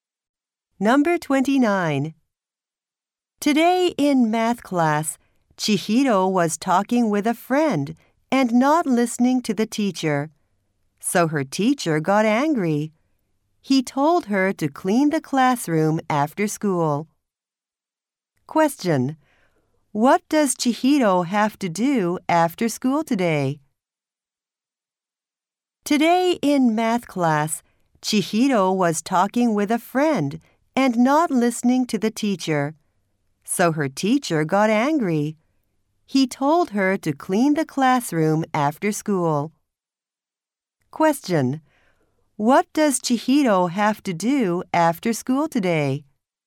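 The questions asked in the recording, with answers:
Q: What does Chihiro have to do after school today?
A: Clean the classroom.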